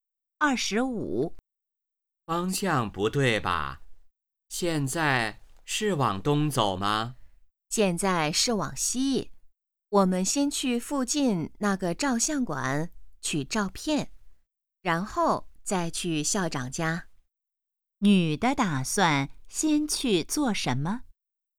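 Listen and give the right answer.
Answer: 去照相馆取照片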